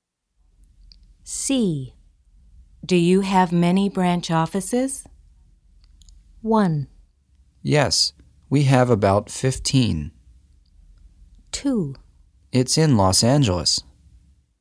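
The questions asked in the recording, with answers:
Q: Do you have many branch offices?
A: 1: Yes, we have about 15.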